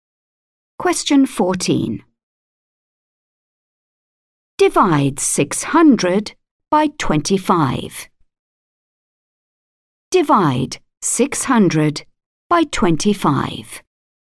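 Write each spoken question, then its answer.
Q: Divide 600 by 25.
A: 24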